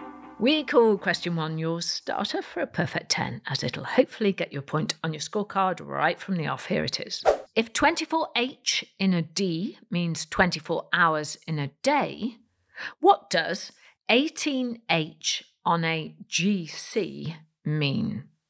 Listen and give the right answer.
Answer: Well, it means 18 holes, beginning with H, obviously, on a golf course.